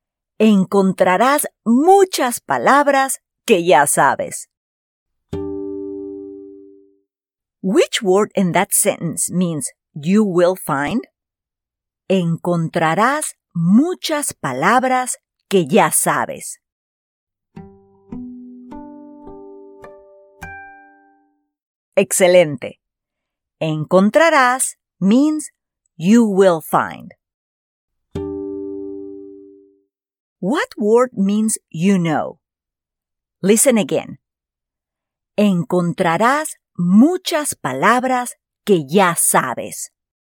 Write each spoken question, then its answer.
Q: Which word in that sentence means you will find?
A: Excelente. Encontrarás means you will find.

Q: What word means you know?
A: Muy bien. Sabes means you know.